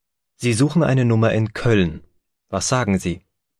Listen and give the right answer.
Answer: Ich suche eine Nummer in Köln.